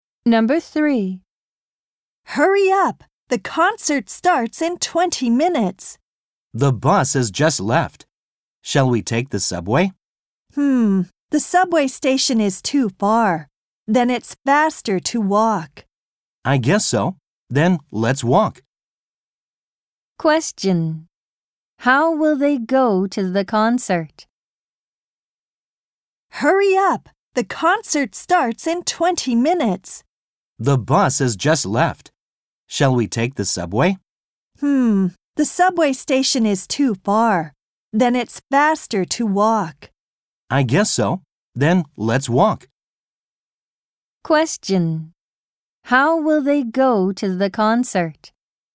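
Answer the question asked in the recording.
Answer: They will walk.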